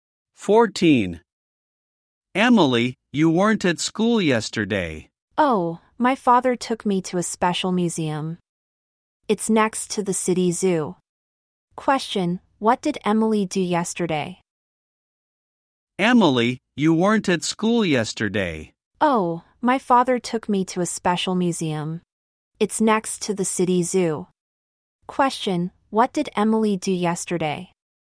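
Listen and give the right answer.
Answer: She went to a special museum with her father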